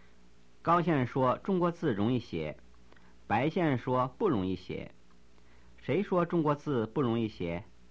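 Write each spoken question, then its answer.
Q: 谁说中国字不容易写?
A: 白先生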